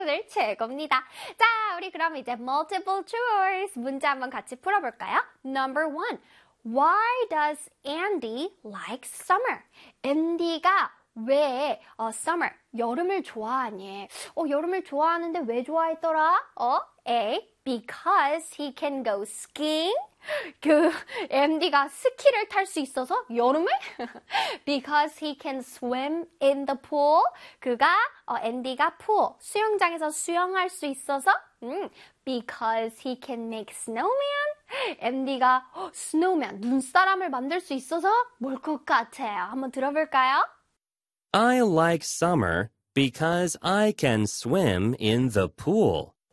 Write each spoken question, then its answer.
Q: why does Andy like summer?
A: 그래서 정답은 짜잔! B가 되겠습니다.